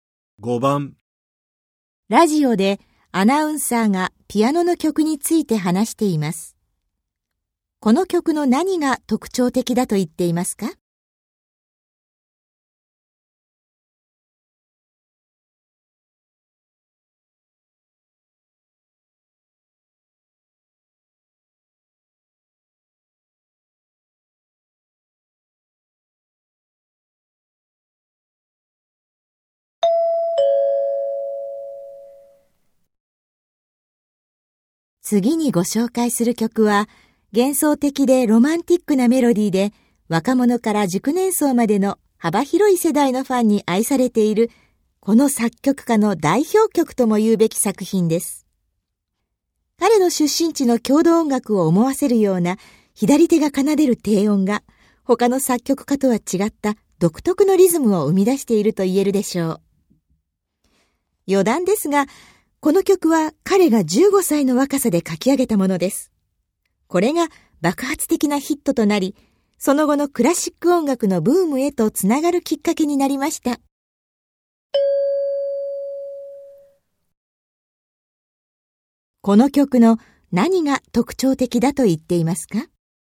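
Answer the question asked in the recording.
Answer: 左手が奏でる低音が生み出す独特のリズム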